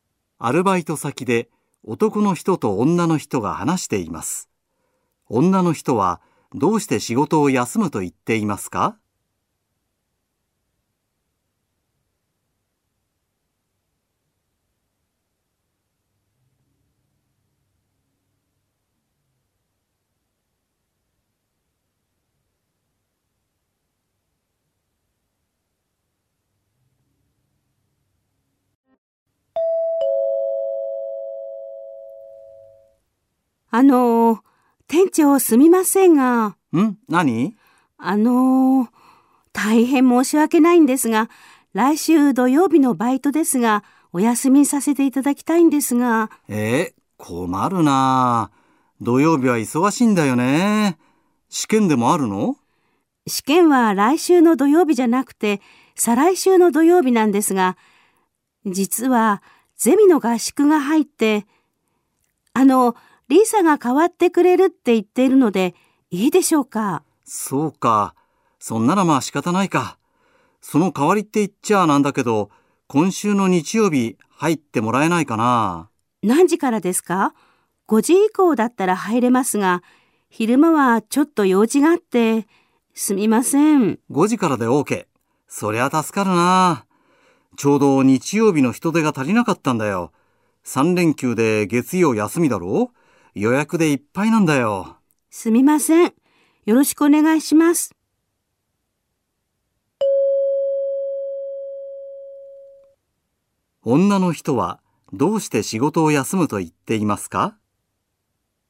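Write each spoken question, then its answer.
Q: 女の人はどうして仕事を休むと言っていますか?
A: ゼミの合宿があるから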